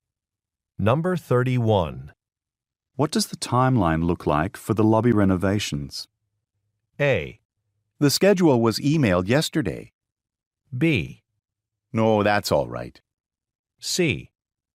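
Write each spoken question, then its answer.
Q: What does the timeline look like for the lobby renovations?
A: A: The schedule was emailed yesterday.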